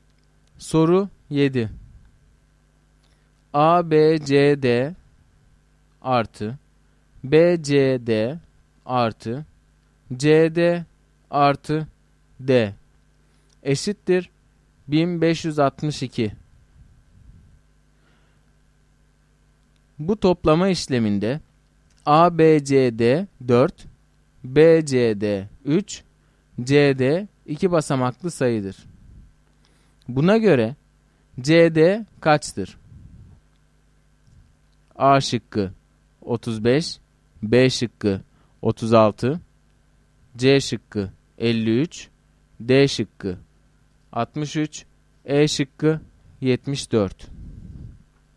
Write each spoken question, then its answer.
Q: Buna göre CD kaçtır?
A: Doğru cevap C şıkkı.